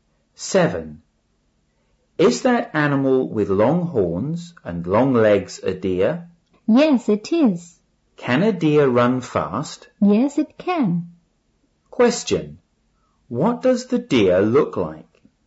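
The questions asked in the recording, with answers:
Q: What does the deer look like?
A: It has long horns and long legs.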